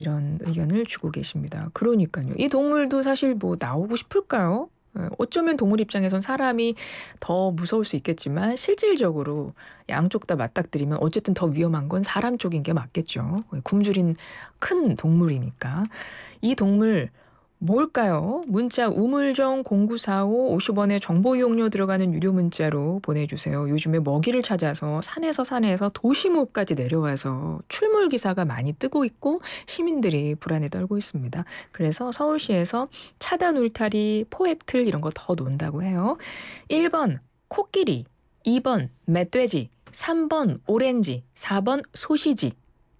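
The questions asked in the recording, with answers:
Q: 이 동물 뭘까요?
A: 2번: 멧돼지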